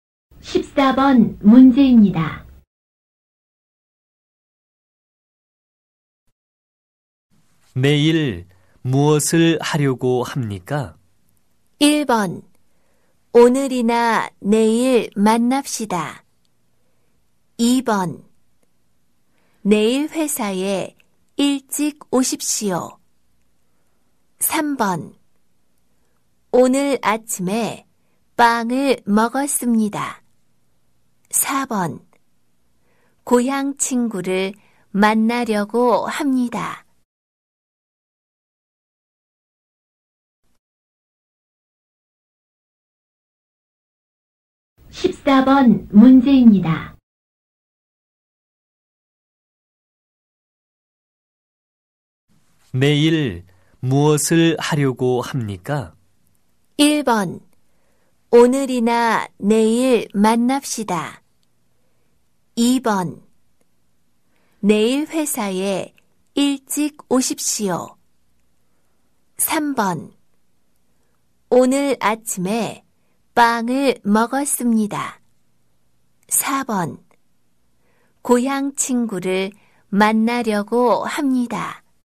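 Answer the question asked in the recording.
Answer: 4: 고향 친구를 만나려고 합니다.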